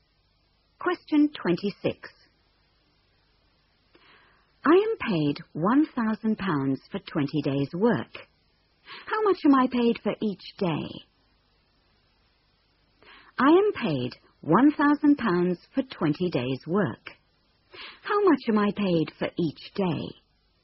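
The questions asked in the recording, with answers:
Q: How much am I paid for each day?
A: £50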